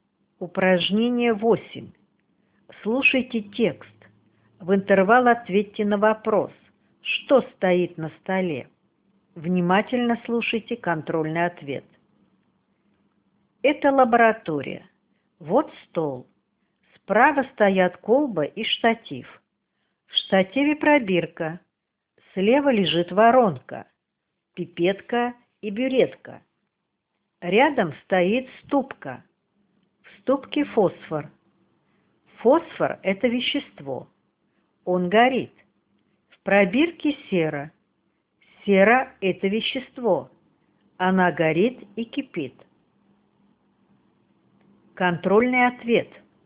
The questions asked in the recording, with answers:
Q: Что стоит на столе?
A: На столе стоят колба, штатив, пробирка и ступка.